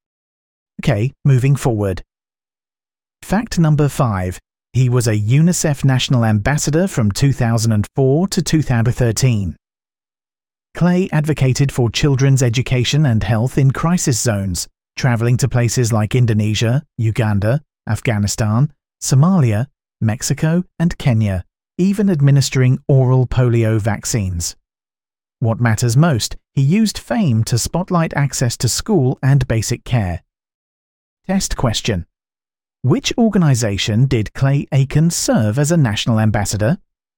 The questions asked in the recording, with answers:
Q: which organization did Clay Aiken serve as a national ambassador?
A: UNICEF.